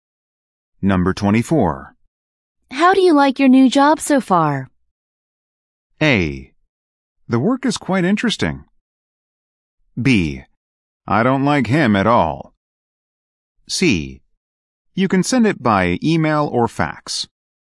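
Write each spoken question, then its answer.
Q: How do you like your new job so far?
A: A: The work is quite interesting.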